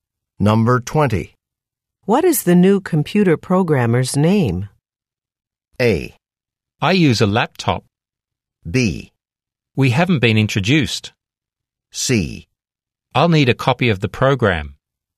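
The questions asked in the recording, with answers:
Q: What is the new computer programmer's name?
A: B: We haven't been introduced.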